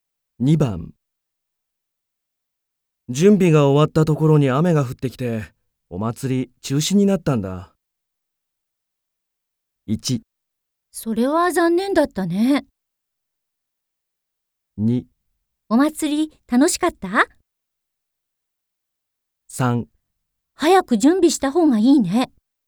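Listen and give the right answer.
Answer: 1: それは残念だったね。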